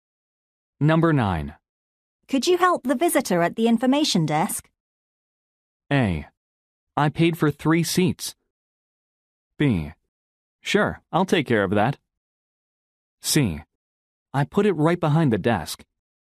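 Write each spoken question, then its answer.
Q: Could you help the visitor at the information desk?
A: B: Sure, I'll take care of that.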